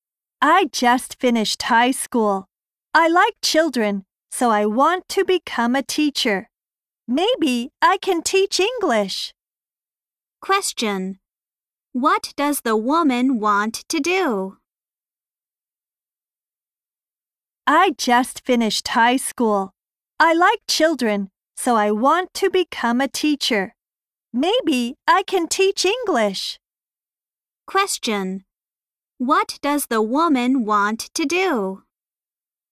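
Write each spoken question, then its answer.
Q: What does the woman want to do?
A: Become a teacher (maybe teach English).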